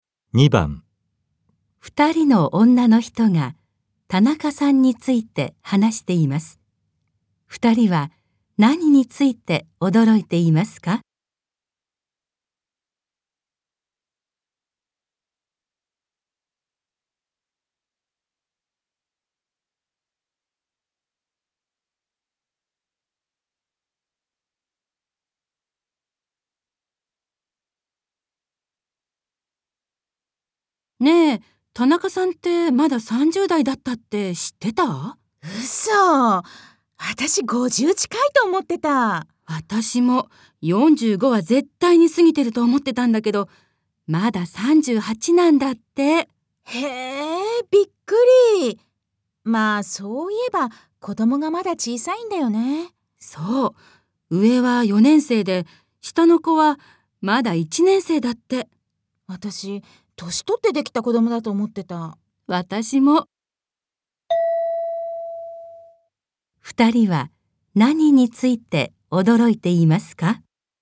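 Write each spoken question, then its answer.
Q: 二人は何について驚いていますか?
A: 田中さんがまだ30代(38歳)であること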